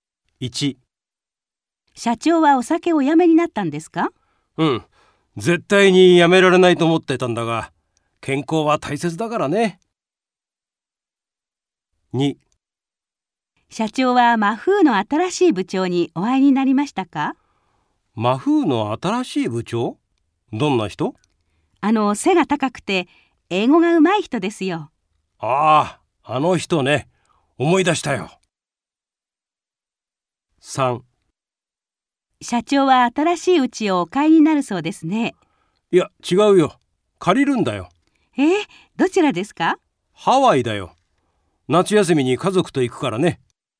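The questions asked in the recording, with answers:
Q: 社長はお酒をやめになったんですか?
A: はい、やめた

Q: 社長は新しい家をお買いになるそうですね。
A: いいえ、買わずにハワイで家を借りる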